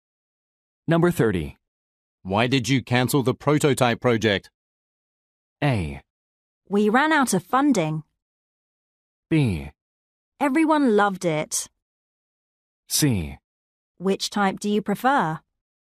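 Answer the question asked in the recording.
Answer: A: We ran out of funding.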